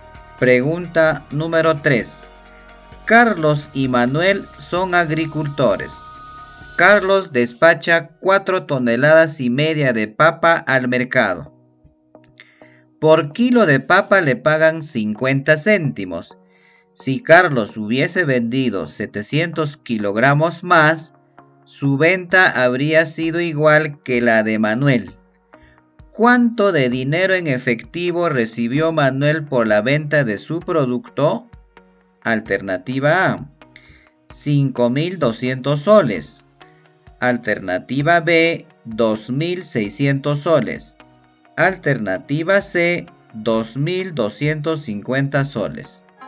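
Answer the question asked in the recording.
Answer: B: 2600 soles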